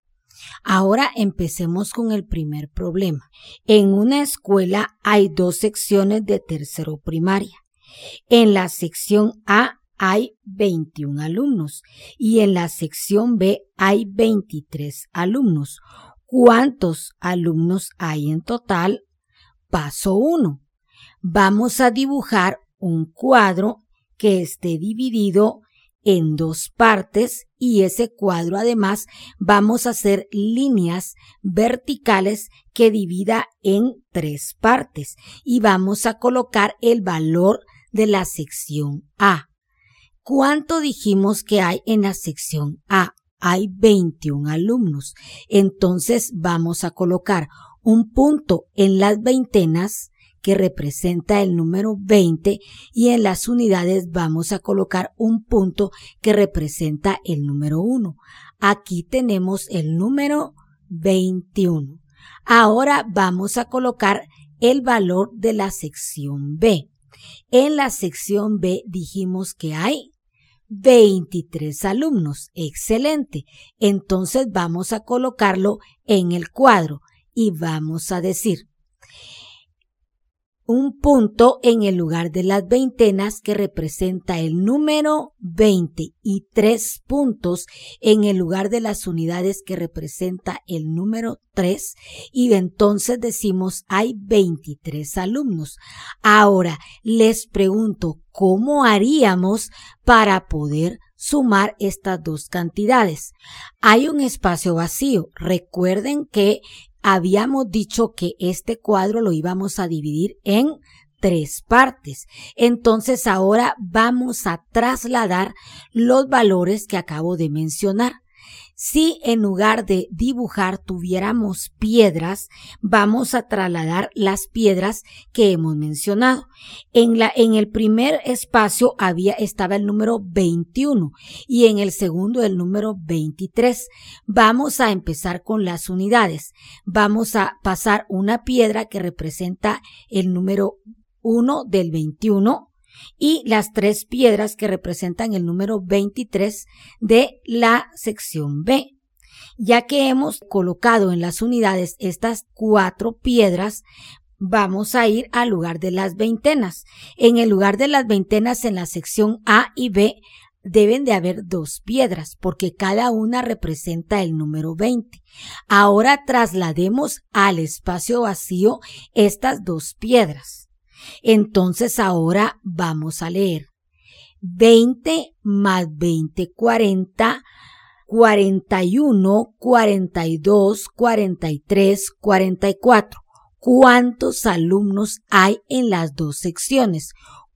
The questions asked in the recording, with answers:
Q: ¿Cuántos alumnos hay en las 2 secciones?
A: 44 alumnos de tercero primaria.